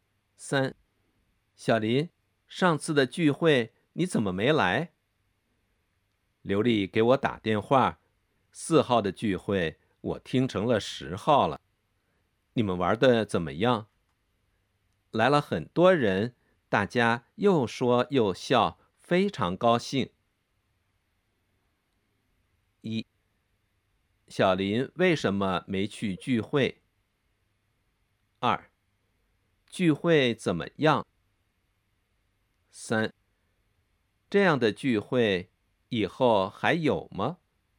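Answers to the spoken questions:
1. 他把4号听成了10号
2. 来了很多人,大家又说又笑,非常高兴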